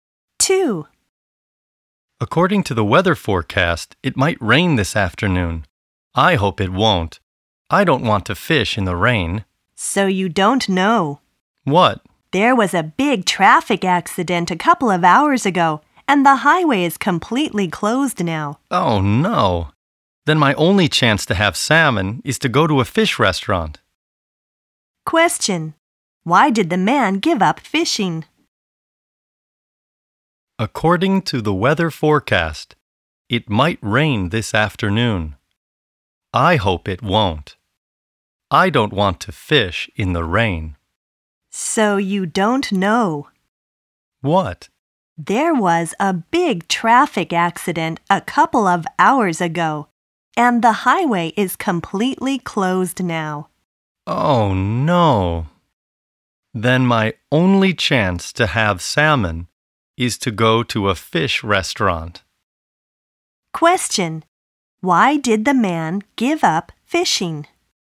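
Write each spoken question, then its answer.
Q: Why did the man give up fishing?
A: Because the highway is closed due to a traffic accident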